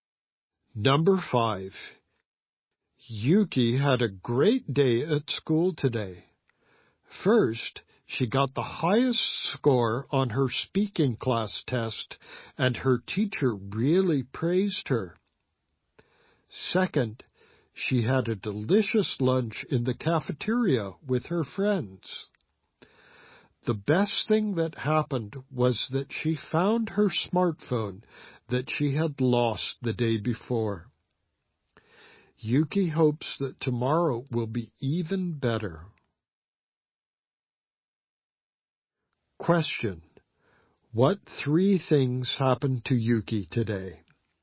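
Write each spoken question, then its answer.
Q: What 3 things happened to Yuki today?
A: She got the highest score on her speaking test, had a delicious lunch with friends, and found her lost smartphone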